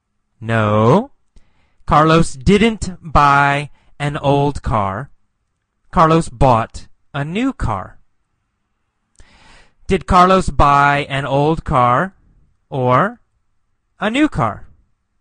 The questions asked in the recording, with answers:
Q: Did Carlos buy an old car or a new car?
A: A new car. Carlos bought a new car.